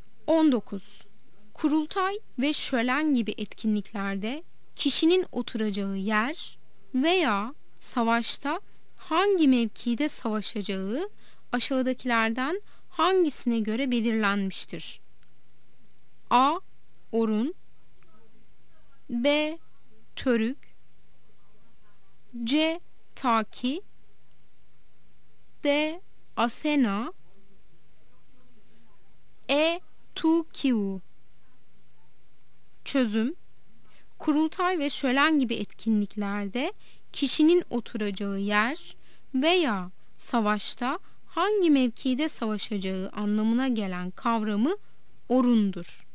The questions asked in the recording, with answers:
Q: Kurultay ve şölen gibi etkinliklerde kişinin oturacağı yer veya savaşta hangi mevkide savaşacağı aşağıdakilerden hangisine göre belirlenmiştir?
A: Yanıt A'dır. Orun.